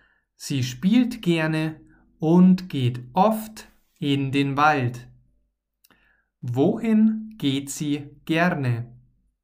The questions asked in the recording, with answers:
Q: Wohin geht sie gerne?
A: In den Wald. Sie geht gerne in den Wald.